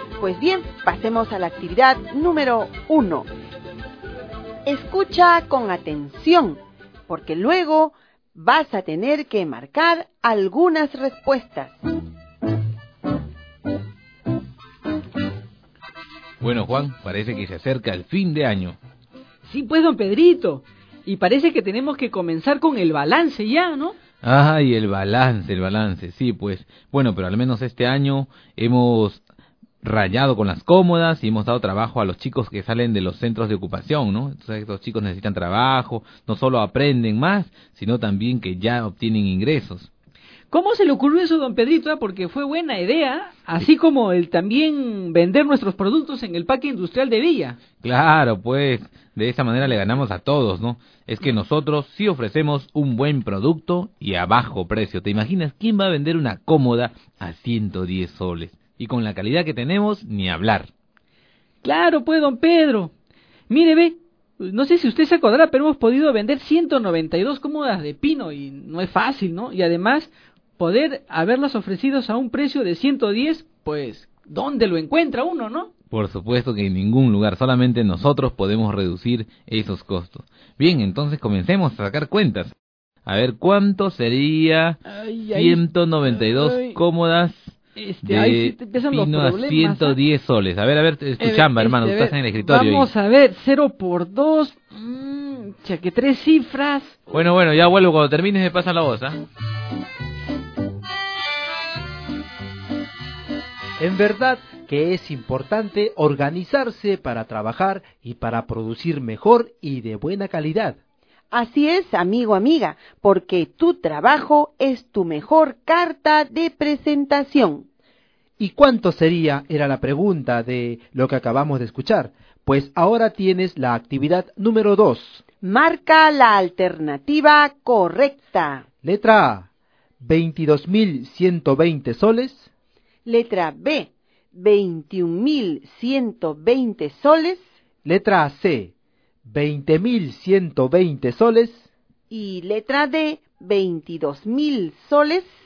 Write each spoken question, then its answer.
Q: ¿Y cuánto sería? Era la pregunta de lo que acabamos de escuchar.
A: Es la letra B.